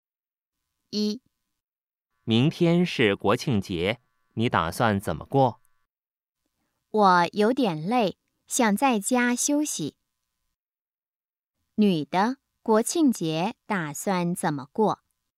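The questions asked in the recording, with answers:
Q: 女的,国庆节打算怎么过?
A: 在家休息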